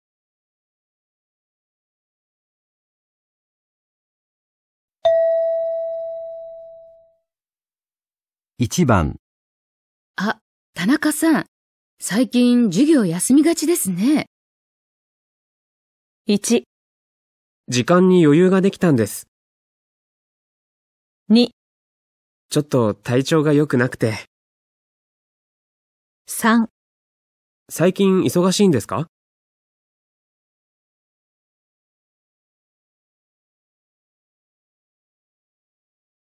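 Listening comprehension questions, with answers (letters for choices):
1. 女:あ、田中さん。最近、授業休みがちですね。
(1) 時間に余裕が出来たんです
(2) ちょっと体調がよくなくて...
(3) 最近忙しいんですか?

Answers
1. 2

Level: 【N2 第2回】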